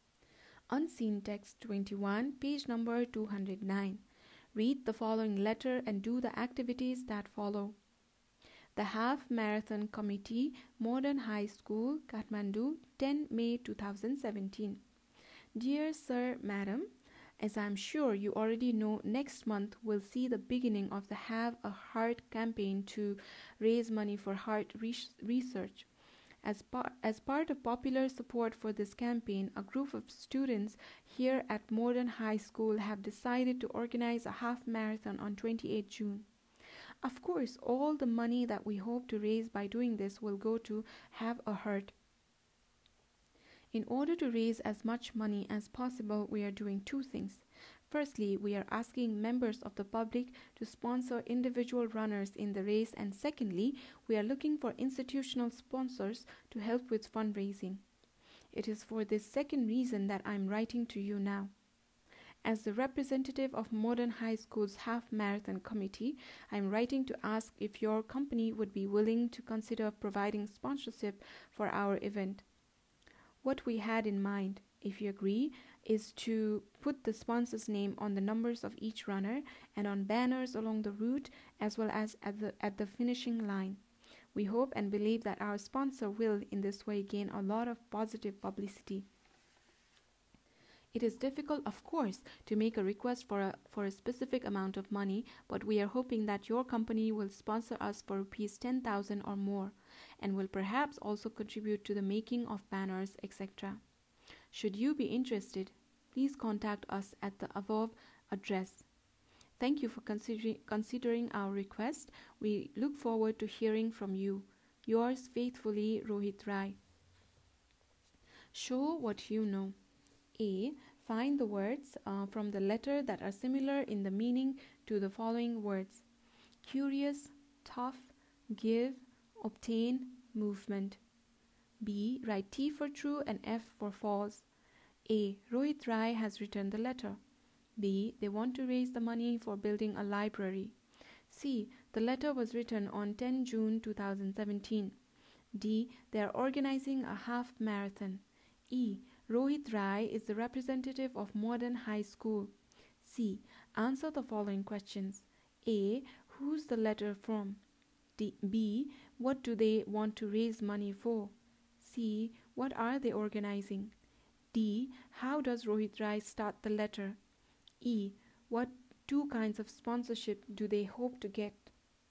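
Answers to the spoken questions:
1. False
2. False
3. True
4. True
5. Rohit Rai
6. Heart research (the Have a Heart campaign)
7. A half marathon
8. Dear Sir, Madam
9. Public sponsorship of individual runners and institutional sponsors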